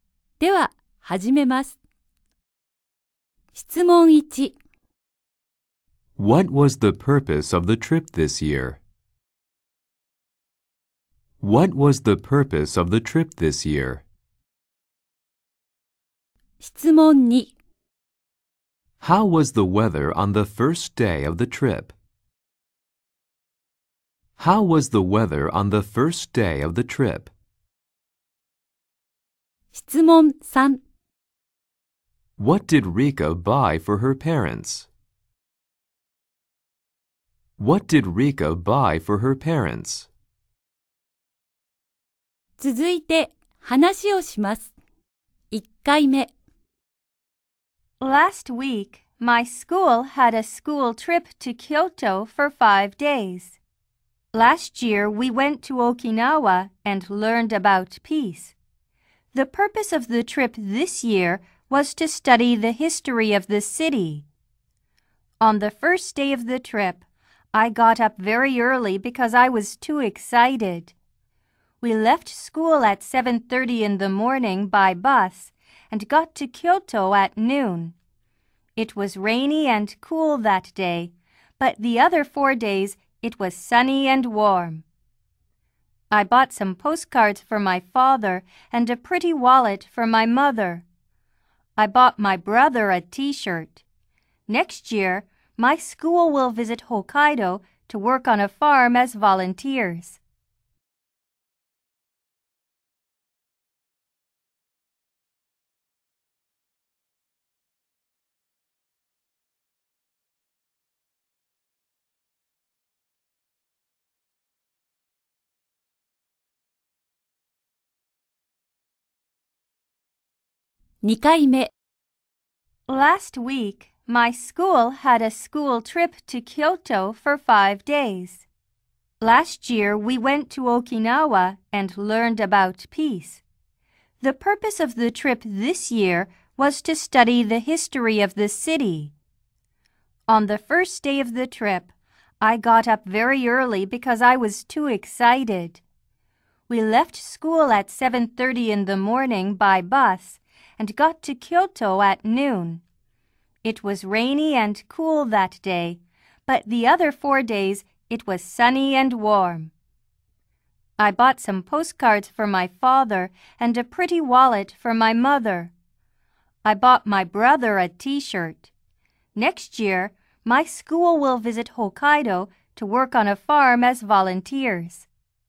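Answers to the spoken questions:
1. To study the history of Kyoto.
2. It was rainy and cool.
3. Some postcards for her father and a pretty wallet for her mother.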